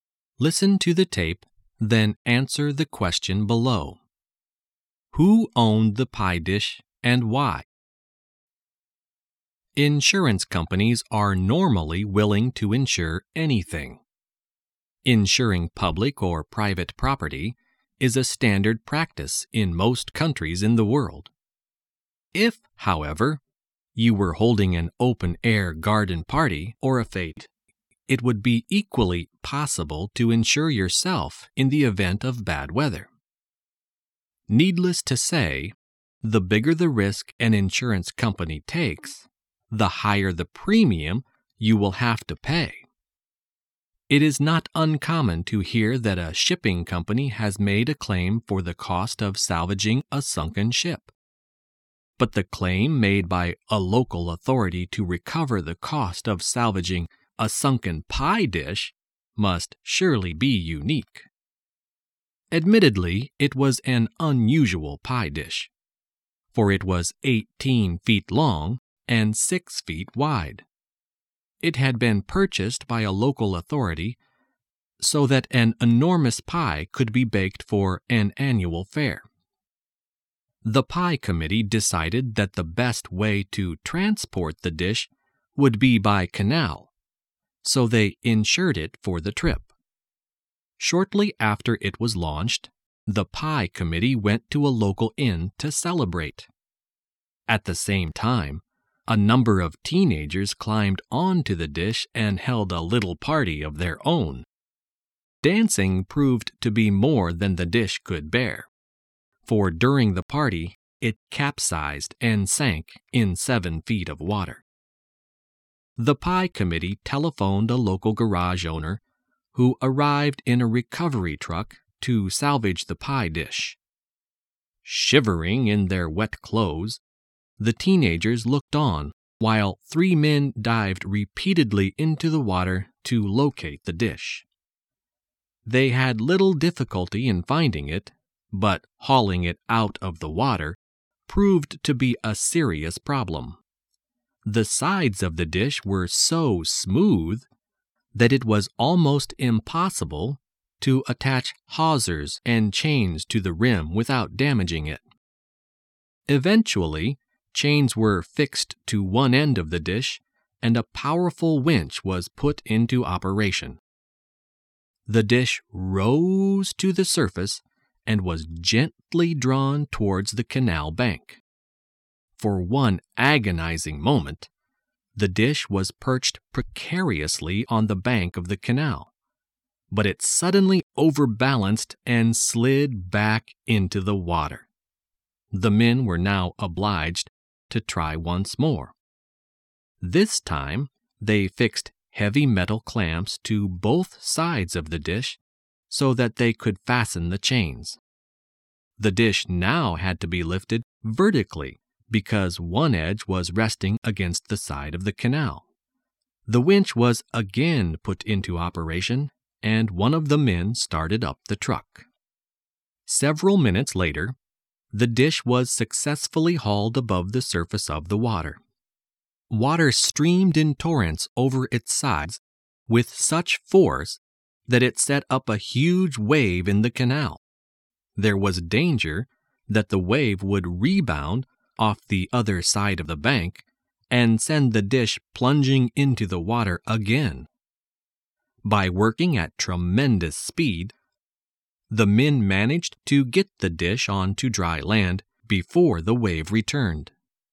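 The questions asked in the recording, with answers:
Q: Who owned the pie dish and why?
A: A local authority owned it; it bought the dish so an enormous pie could be baked for an annual fair.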